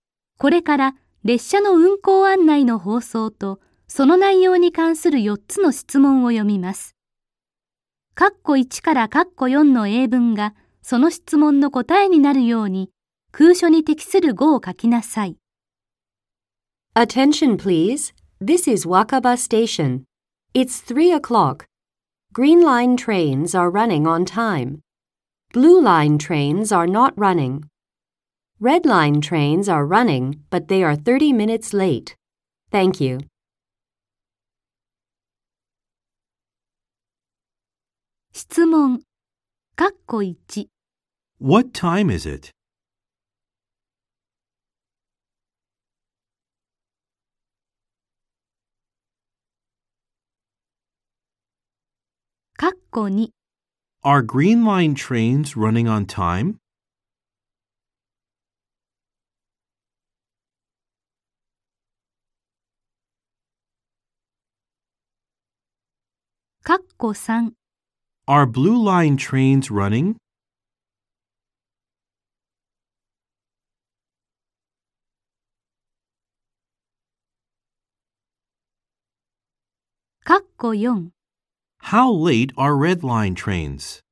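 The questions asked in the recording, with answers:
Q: What time is it?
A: It's 3 o'clock.

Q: Are green line trains running on time?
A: Yes, they are.

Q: Are blue line trains running?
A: No, they aren't.

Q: How late are red line trains?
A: 30 minutes late.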